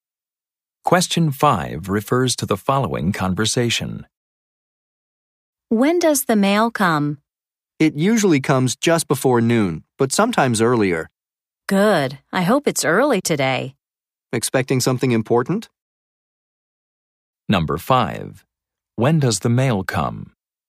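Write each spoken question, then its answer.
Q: When does the mail come?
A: Usually just before noon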